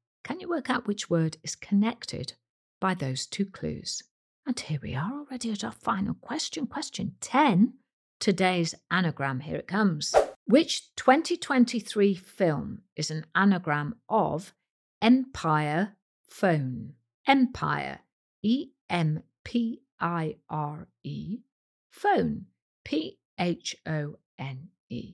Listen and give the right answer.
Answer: The answer is the hugely successful Oppenheimer.